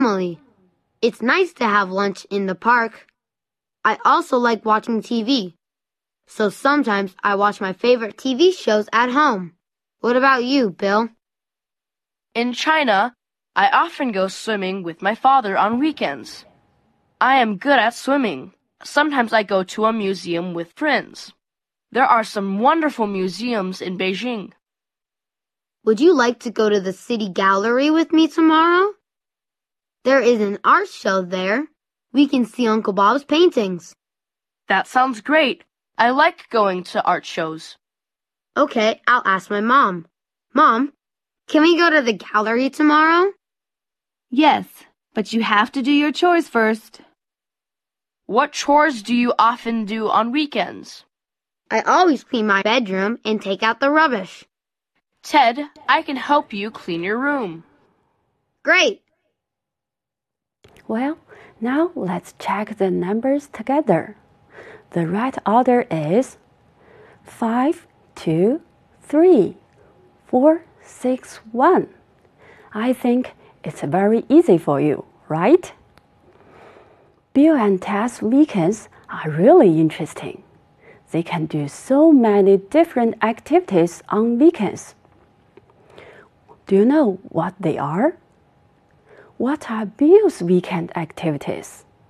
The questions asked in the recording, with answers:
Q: What are Bill's weekend activities?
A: Bill often goes swimming with his father on weekends.